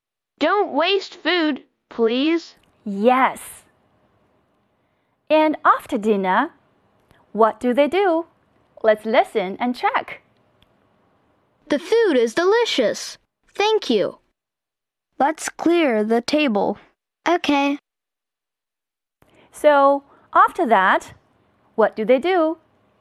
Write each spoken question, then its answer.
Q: So, after that, what do they do?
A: They clear the table.